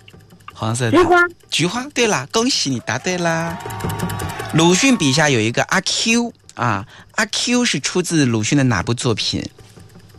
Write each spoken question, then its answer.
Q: 阿 Q 是出自鲁迅的哪部作品?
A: 阿 Q 正传。